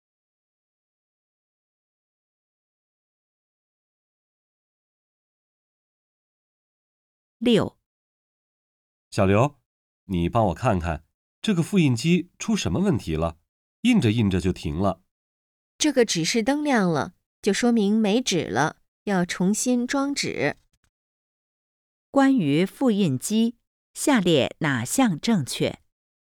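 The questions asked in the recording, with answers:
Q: 关于复印机,下列哪项正确?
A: 没纸了,需要重新装纸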